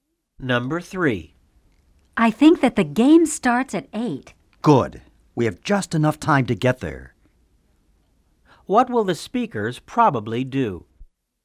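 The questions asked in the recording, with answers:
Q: What will the speakers probably do?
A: Go to the game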